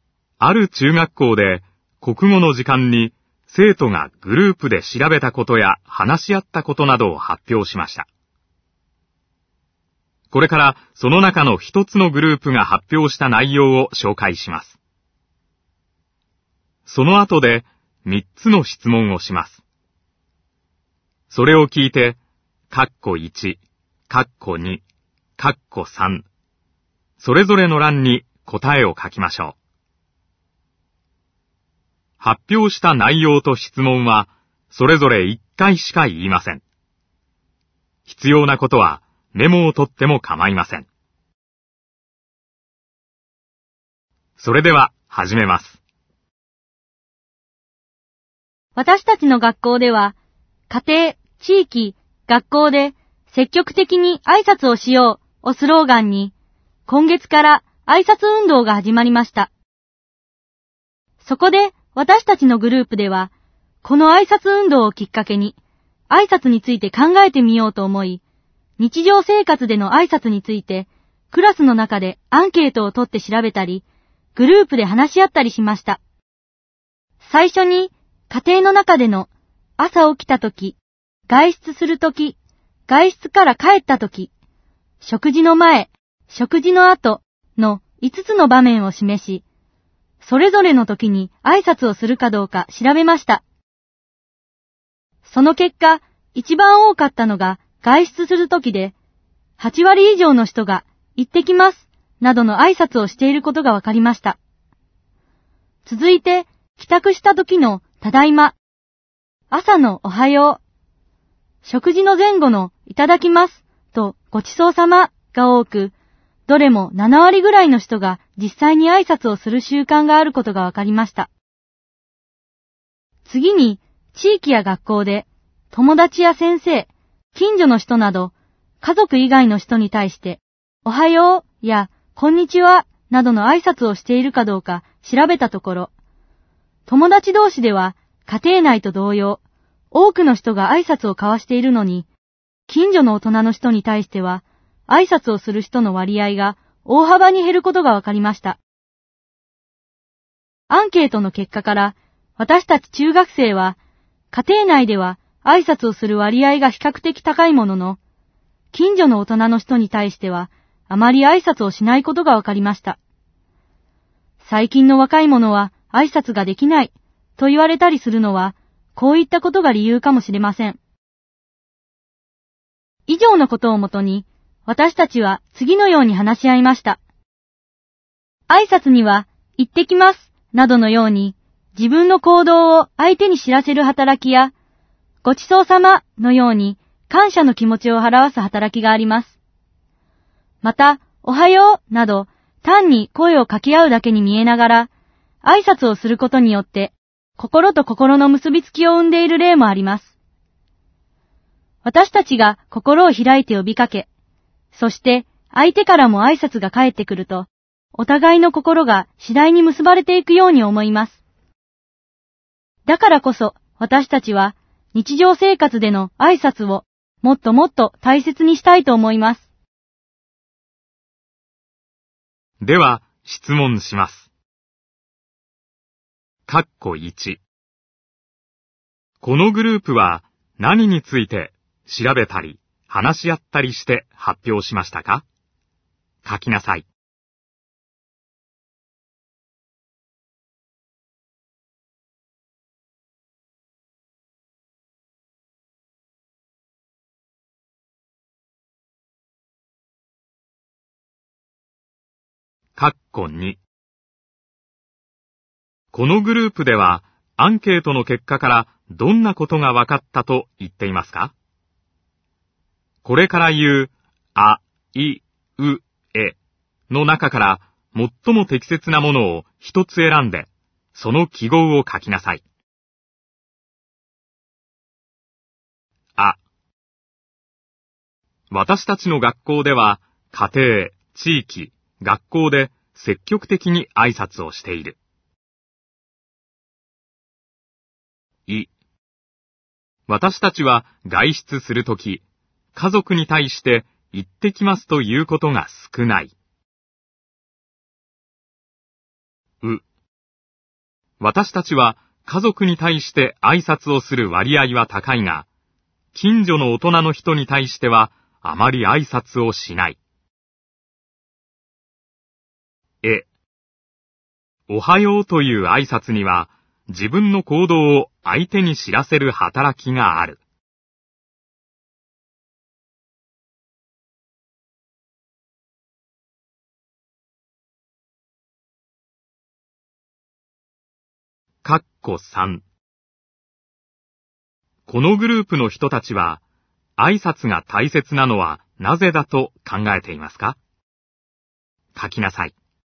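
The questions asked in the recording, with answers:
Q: このグループは、何について、調べたり、話し合ったりして発表しましたか?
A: 日常生活での挨拶について

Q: このグループではアンケートの結果からどんなことが分かったと言っていますか?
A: う: 私たちは家族に対して挨拶をする割合は高いが、近所の大人の人に対してはあまり挨拶をしない。

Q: このグループの人たちは、挨拶が大切なのはなぜだと考えていますか?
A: 挨拶を交わすことでお互いの心が次第に結ばれていくから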